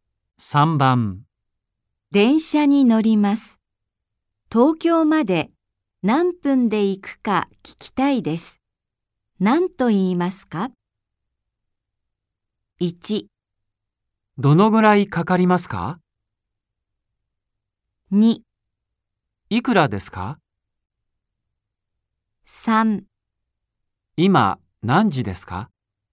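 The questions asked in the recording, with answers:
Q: 何と言いますか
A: 1: どのぐらいかかりますか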